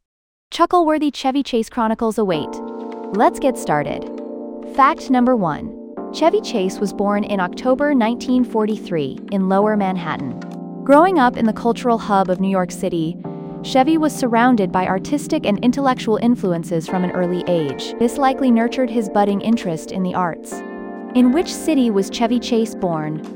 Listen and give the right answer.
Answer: Correct answer, Lower Manhattan.